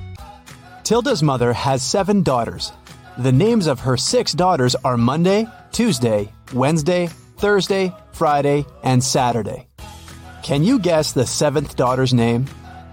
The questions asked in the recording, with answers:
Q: Can you guess the seventh daughter's name?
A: That's right, it's Tilda.